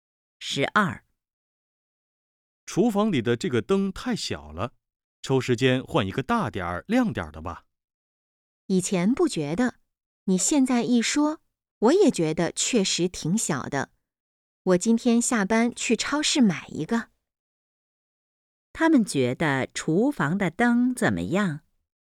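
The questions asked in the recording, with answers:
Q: 他们觉得厨房的灯怎么样?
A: 太小了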